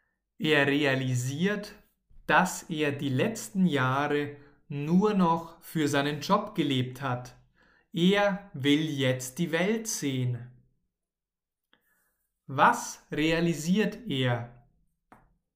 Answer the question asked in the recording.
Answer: Dass er nur noch für den Job gelebt hat.